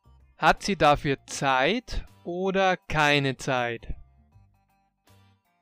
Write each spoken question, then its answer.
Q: Hat sie dafür Zeit oder keine Zeit?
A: Keine Zeit. Sie hat dafür keine Zeit.